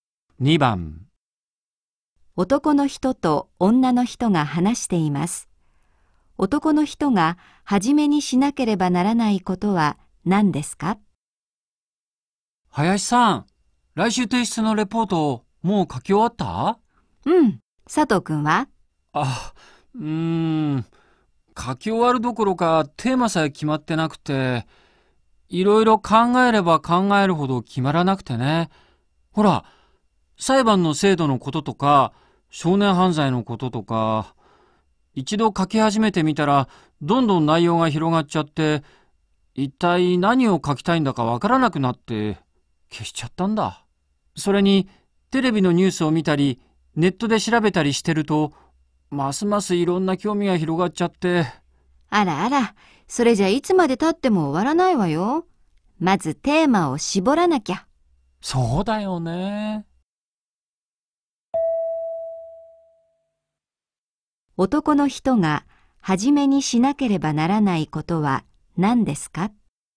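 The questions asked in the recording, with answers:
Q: 男の人が初めにしなければならないことは何ですか?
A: テーマを絞ること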